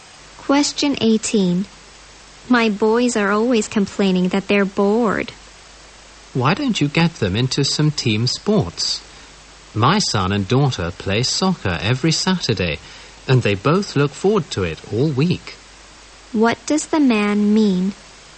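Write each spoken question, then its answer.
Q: What does the man mean?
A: The woman should get her boys into team sports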